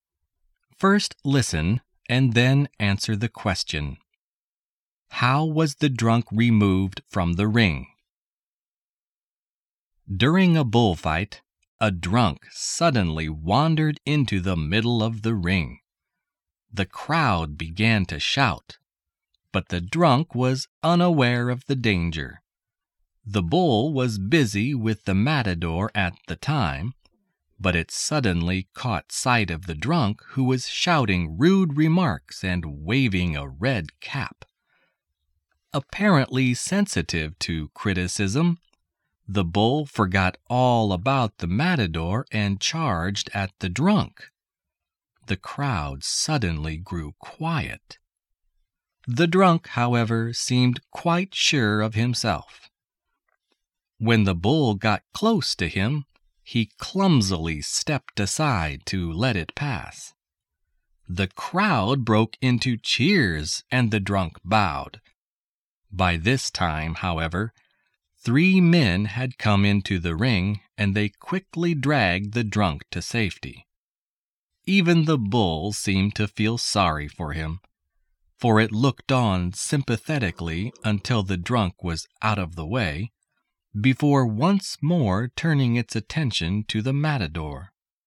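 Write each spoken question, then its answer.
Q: How was the drunk removed from the ring?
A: Three men came into the ring and dragged him to safety.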